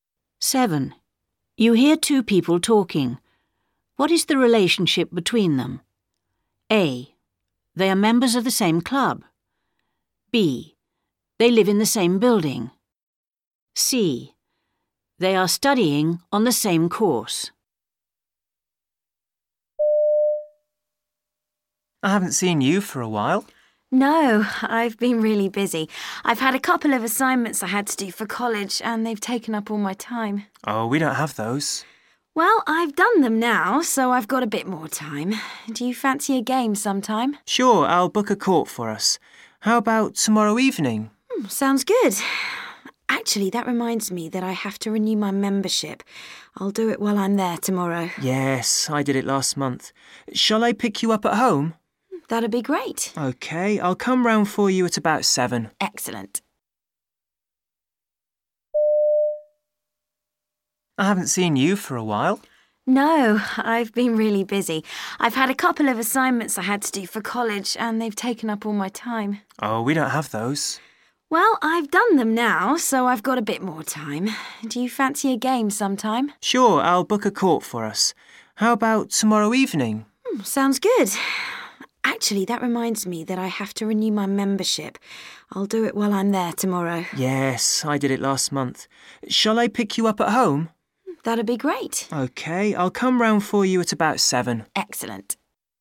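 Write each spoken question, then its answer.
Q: What is the relationship between them?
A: A: They are members of the same club.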